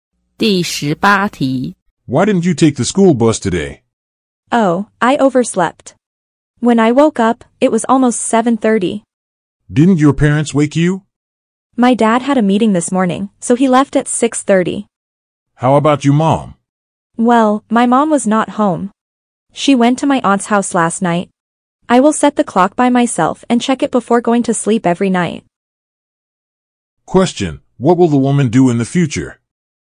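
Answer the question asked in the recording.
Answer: Set the clock herself and check it every night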